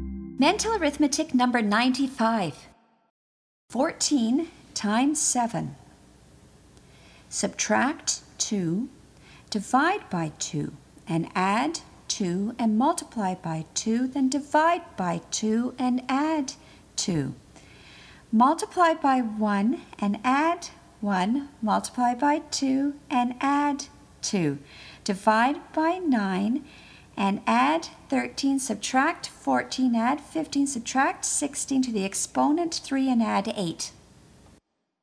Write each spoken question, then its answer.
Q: 14 times 7. Subtract 2, divide by 2, and add 2 and multiply by 2, then divide by 2 and add 2. Multiply by 1 and add 1, multiply by 2 and add 2. Divide by 9 and add 13, subtract 14, add 15, subtract 16 to the exponent 3 and add 8.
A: And the answer is 1008.